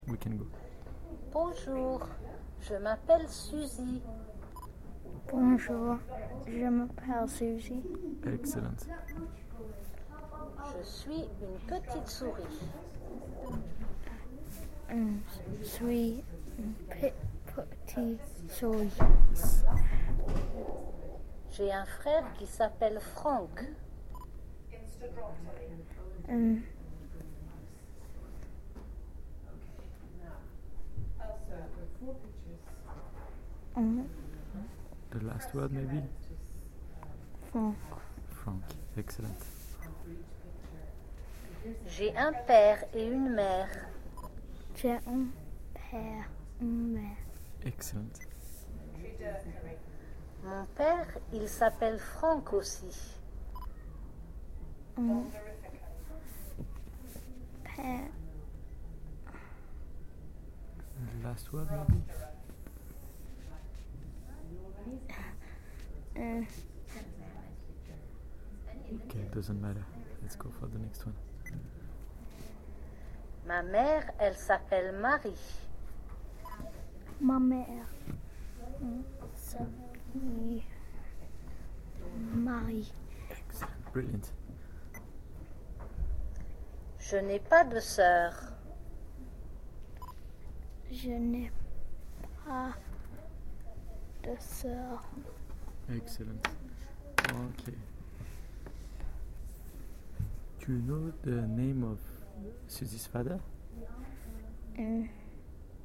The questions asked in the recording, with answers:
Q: Do you know the name of Suzy's father?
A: It's Frank.